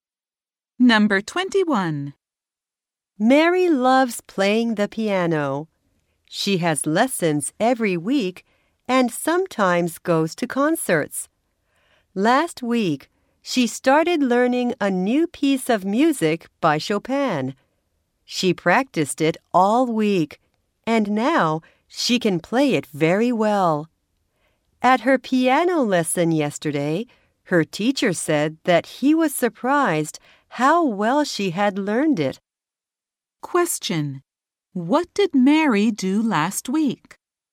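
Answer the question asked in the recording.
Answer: She started learning a new Chopin piece and practiced it all week.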